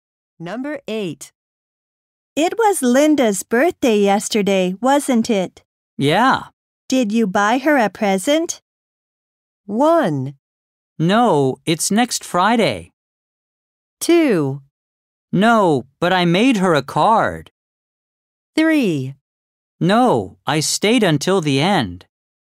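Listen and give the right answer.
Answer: 2: No, but I made her a card.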